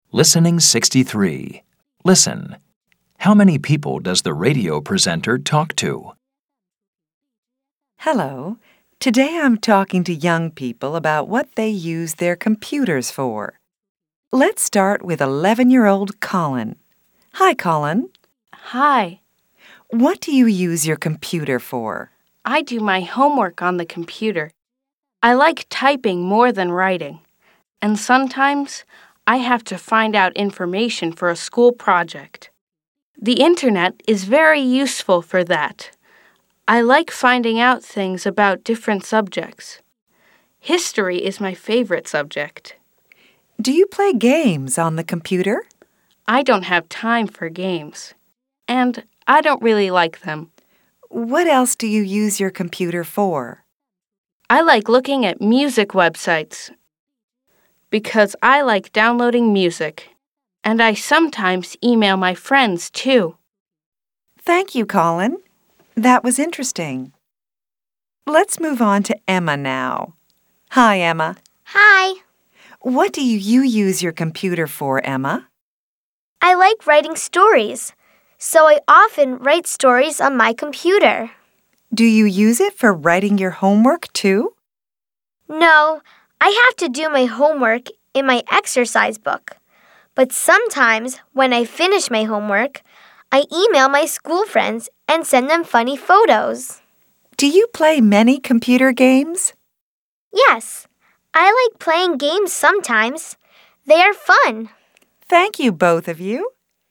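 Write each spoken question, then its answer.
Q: How many people does the radio presenter talk to?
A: Two (Colin and Emma)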